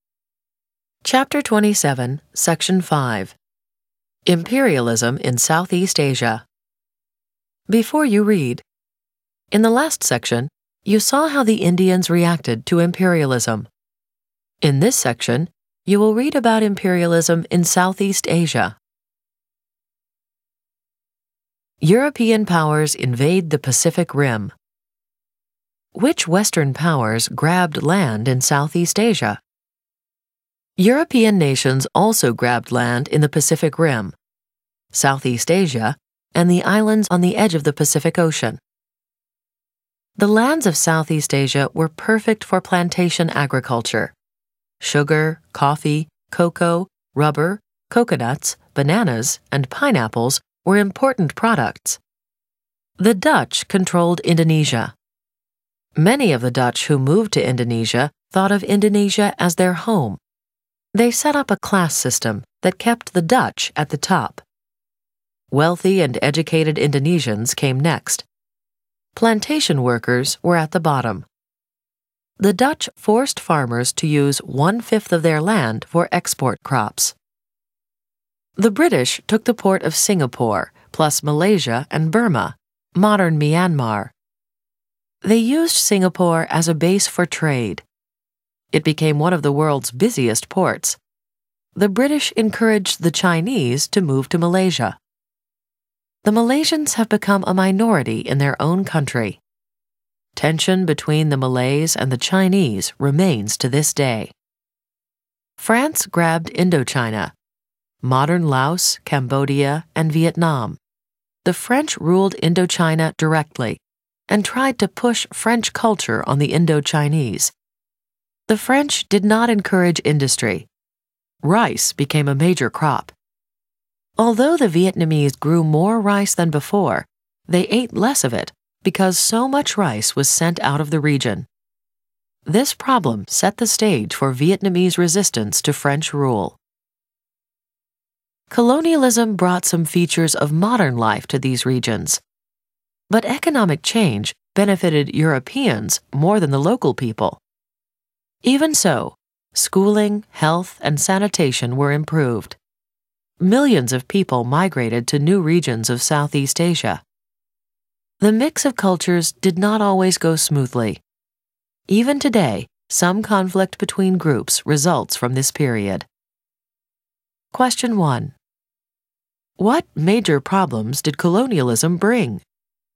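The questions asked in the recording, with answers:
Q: What major problems did colonialism bring?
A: Economic change benefited Europeans more than local people; food (rice) shortages; cultural conflicts from migration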